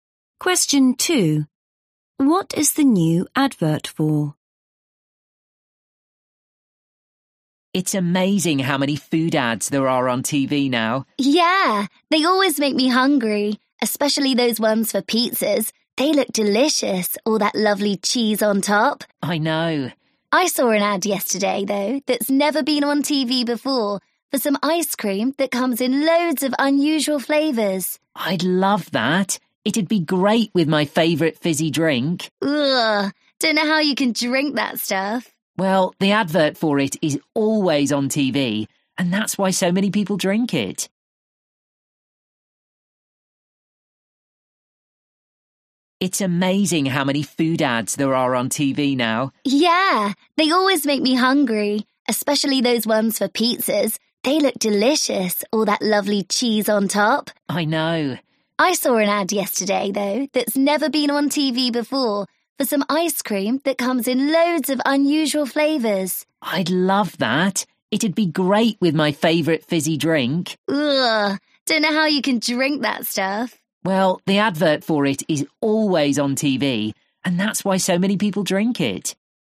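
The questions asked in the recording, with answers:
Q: What is the new advert for?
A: ice cream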